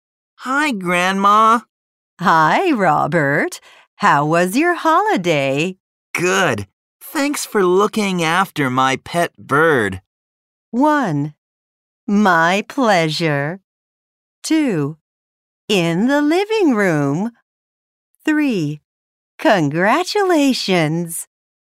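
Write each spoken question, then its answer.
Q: Good. Thanks for looking after my pet bird.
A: 1: My pleasure.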